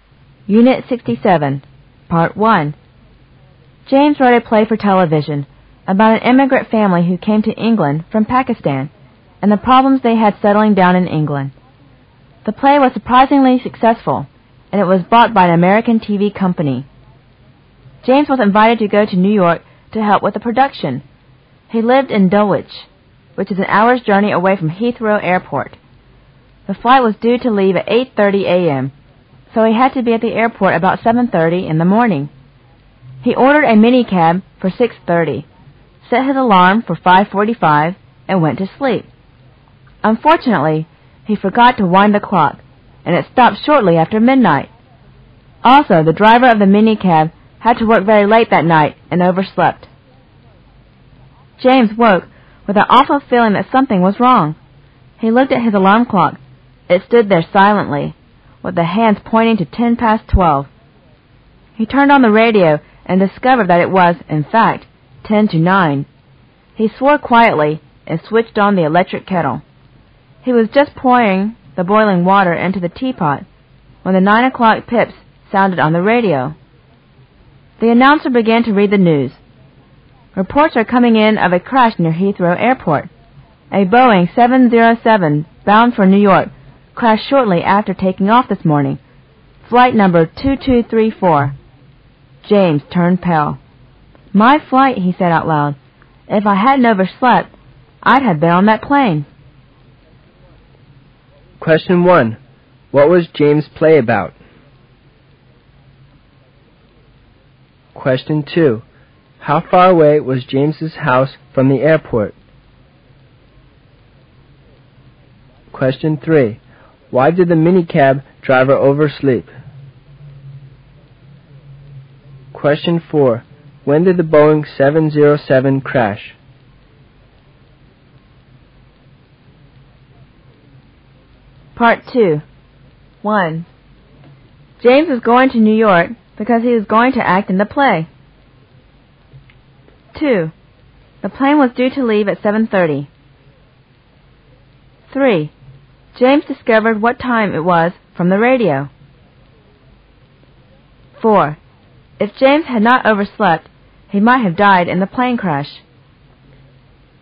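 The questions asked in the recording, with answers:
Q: What was James' play about?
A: An immigrant family from Pakistan and their problems settling in England

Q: How far away was James's house from the airport?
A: An hour's journey

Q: Why did the minicab driver oversleep?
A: He had worked very late that night

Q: When did the Boeing 707 crash?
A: Shortly after taking off that morning

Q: James was going to New York because he was going to act in the play.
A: False

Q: The plane was due to leave at 7:30.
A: False

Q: James discovered what time it was from the radio.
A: True

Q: If James had not overslept, he might have died in the plane crash.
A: True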